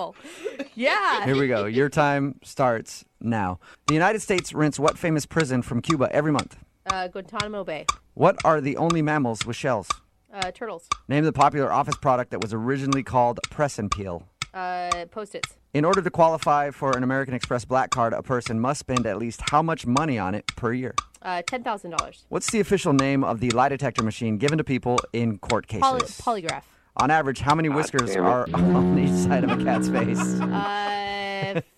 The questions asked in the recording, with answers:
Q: The United States rents what famous prison from Cuba every month?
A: Guantanamo Bay. Pay $4,000.

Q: Name the popular office product that was originally called Press and Peel.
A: The popular office product that was originally called the press and peel was Post-it notes.

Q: What's the official name of the lie detector machine given to people in court cases?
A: Polygraph.